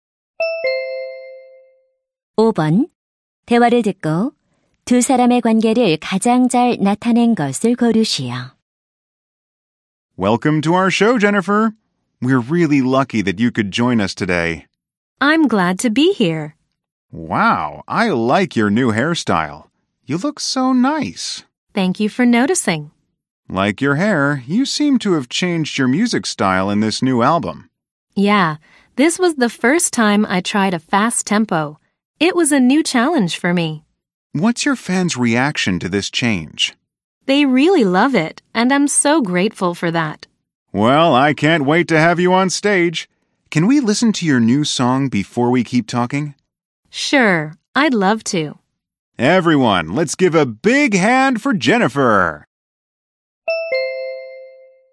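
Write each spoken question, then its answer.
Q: 대화를 듣고 두 사람의 관계를 가장 잘 나타낸 것을 고르시오.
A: 쇼 진행자 - 가수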